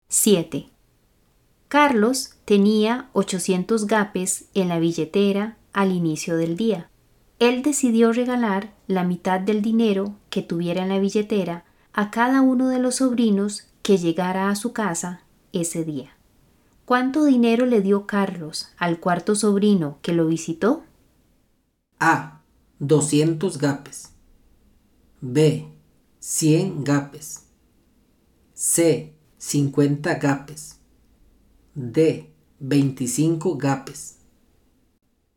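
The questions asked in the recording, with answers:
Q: ¿Cuánto dinero le dio Carlos al cuarto sobrino que lo visitó?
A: C: 50 gapes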